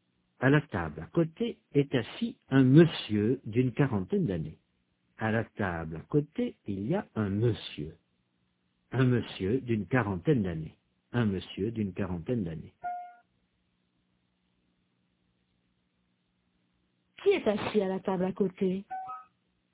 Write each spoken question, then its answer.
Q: Qui est assis à la table à côté?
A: Un monsieur d'une quarantaine d'années.